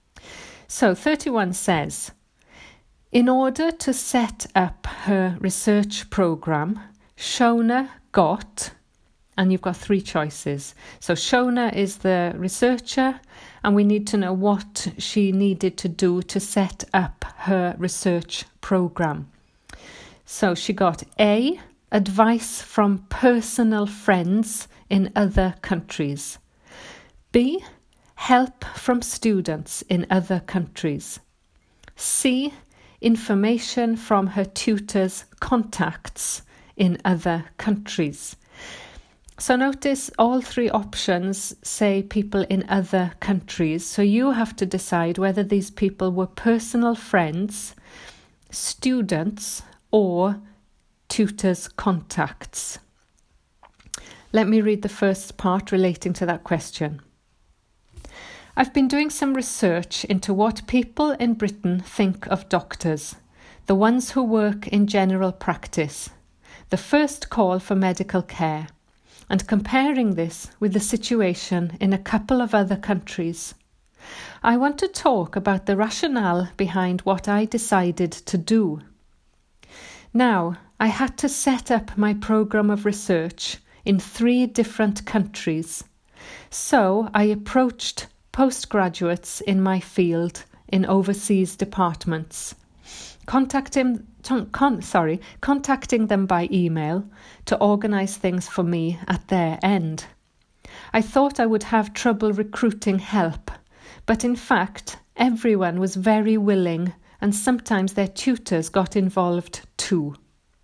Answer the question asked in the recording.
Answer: The answer is B, help from students in other countries.